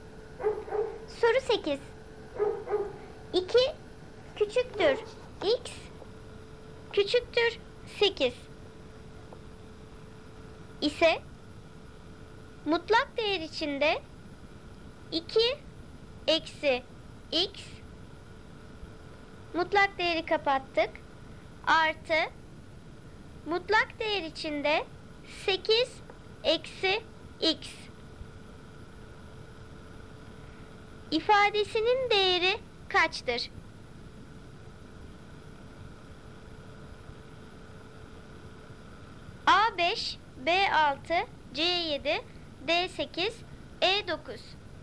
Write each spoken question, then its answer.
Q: ifadesinin değeri kaçtır?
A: Doğru cevap B6.